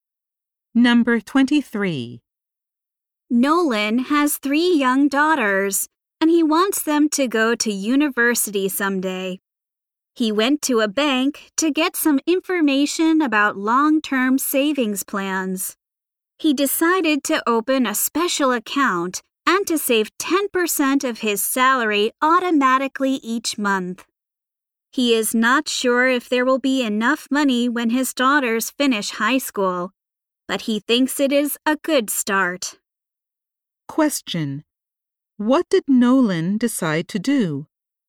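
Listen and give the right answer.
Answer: Open a special account and automatically save 10% of his salary each month.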